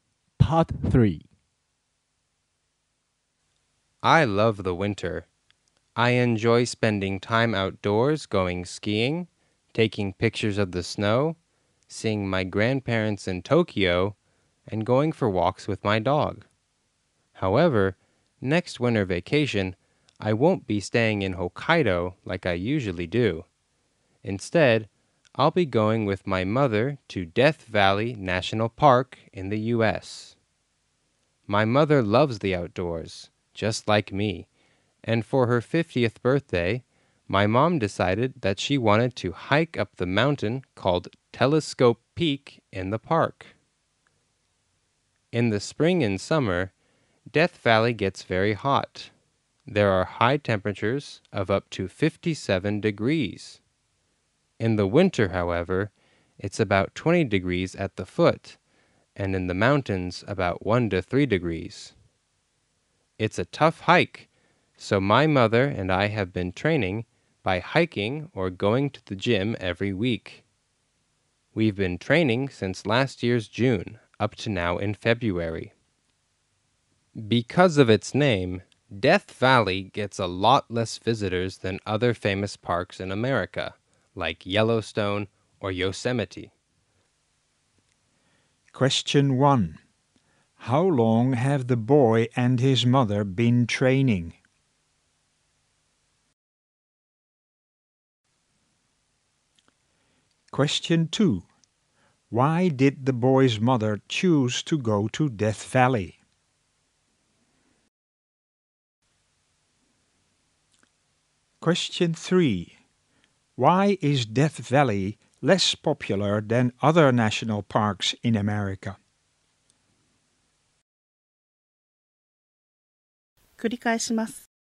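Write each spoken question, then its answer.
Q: How long have the boy and his mother been training?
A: About eight months (since last June)

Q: Why did the boy's mother choose to go to Death Valley?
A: For her 50th birthday she wanted to hike up Telescope Peak

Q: Why is Death Valley less popular than other national parks in America?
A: Because of its name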